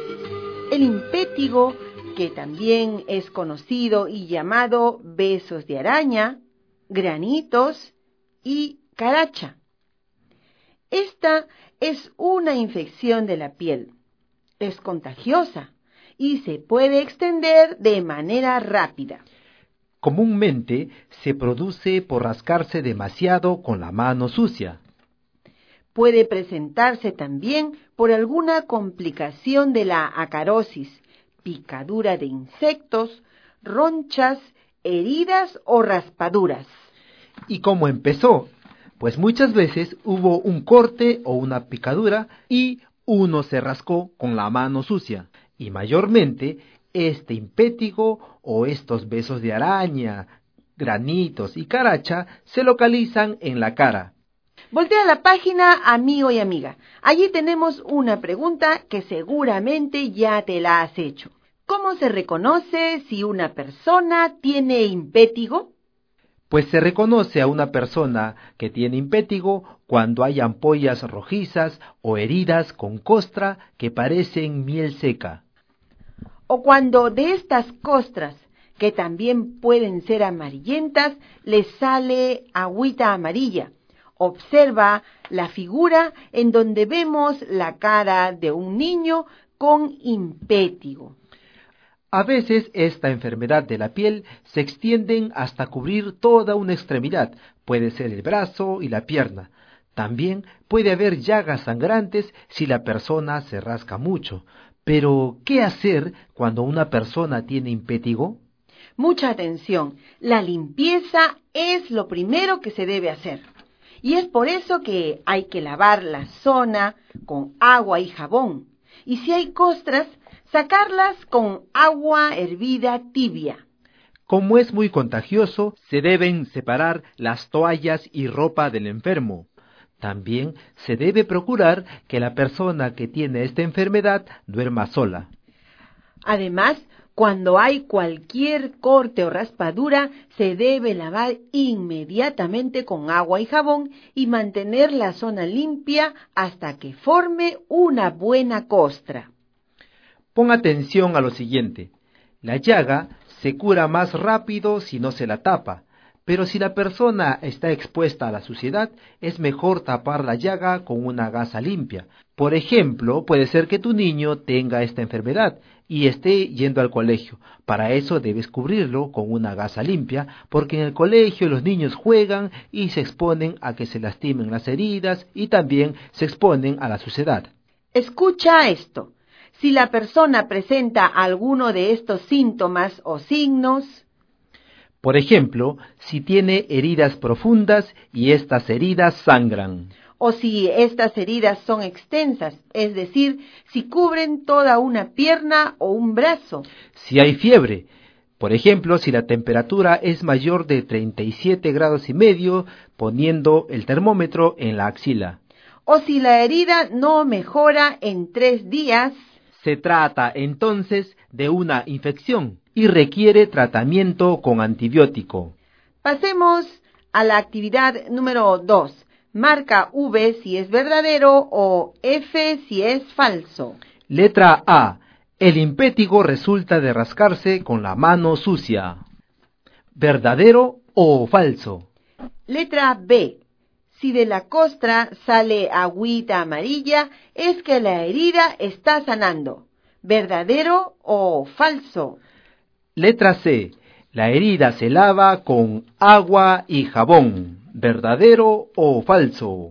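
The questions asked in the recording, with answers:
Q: Letra A. El impétigo resulta de rascarse con la mano sucia.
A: Verdadero

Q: Letra B. Si de la costra sale agüita amarilla, es que la herida está sanando.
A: Falso

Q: Letra C. La herida se lava con agua y jabón.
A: Verdadero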